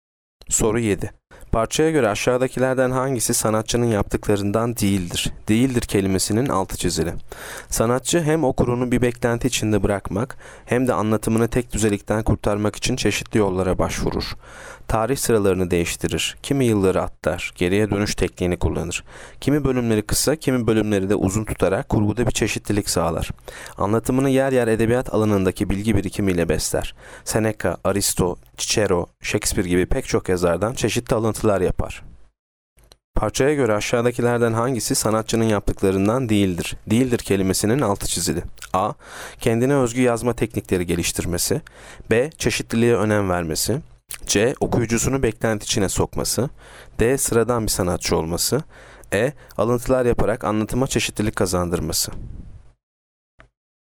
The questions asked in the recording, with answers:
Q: Parçaya göre aşağıdakilerden hangisi sanatçının yaptıklarından değildir?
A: Yanıt D. Sıradan bir sanatçı olması.